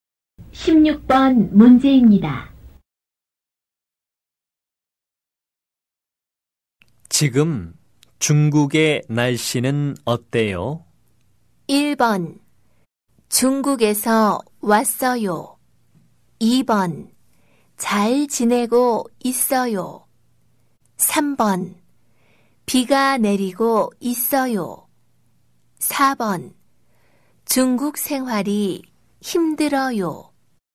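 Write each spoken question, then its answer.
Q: 지금 중국의 날씨는 어때요?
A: 3: 비가 내리고 있어요.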